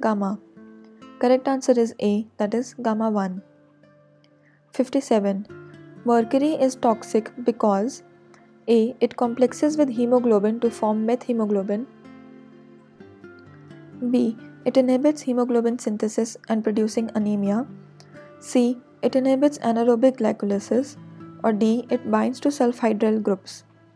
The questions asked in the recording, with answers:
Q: Mercury is toxic because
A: Correct answer is D. That is, it binds to the sulfhydryl groups.